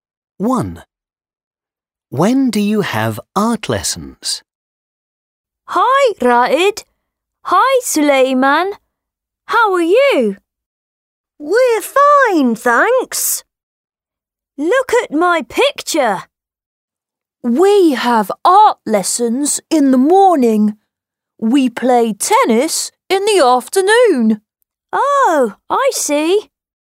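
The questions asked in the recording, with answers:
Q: When do you have art lessons?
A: In the morning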